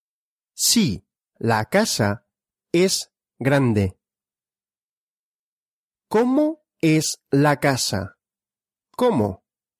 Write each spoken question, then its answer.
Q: ¿Cómo es la casa? ¿Cómo?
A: Grande. La casa es grande.